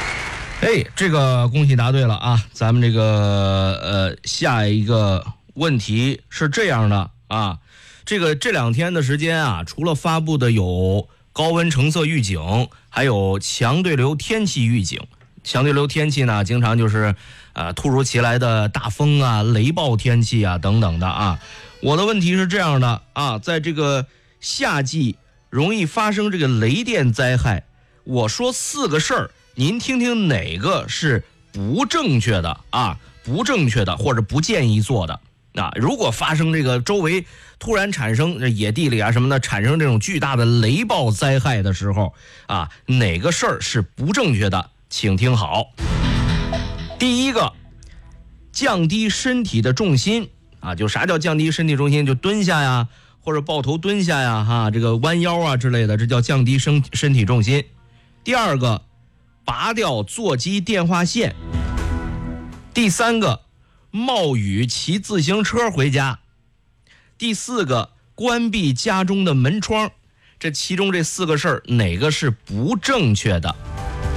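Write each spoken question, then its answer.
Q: 这其中这四个事儿,哪个是不正确的?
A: 第三个: 冒雨骑自行车回家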